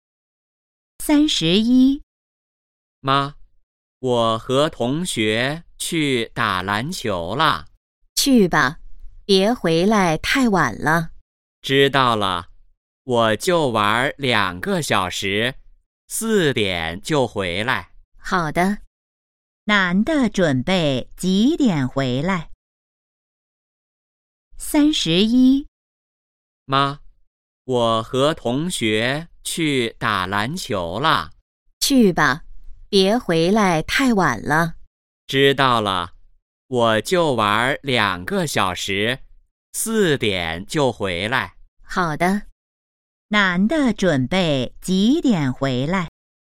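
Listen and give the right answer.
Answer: 四点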